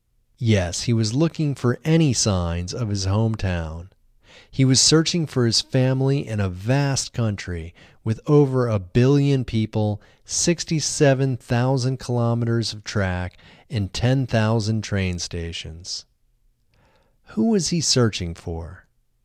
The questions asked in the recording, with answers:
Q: Who was he searching for?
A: He was searching for his family.